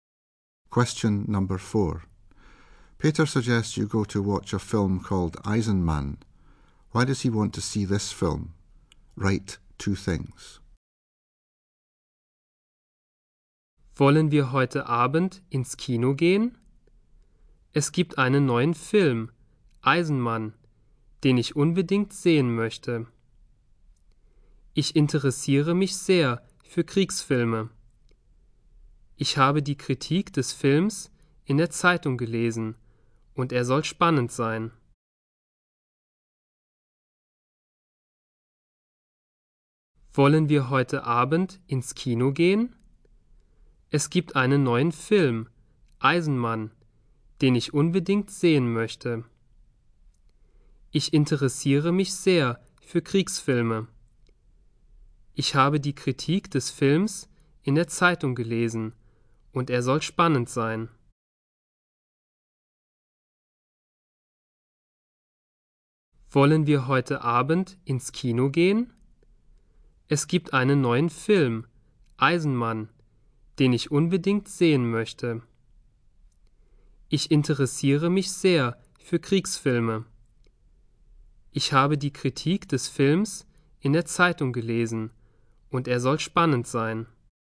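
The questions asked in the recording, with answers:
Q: Why does he want to see this film?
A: He is very interested in war films; the review in the paper says it is exciting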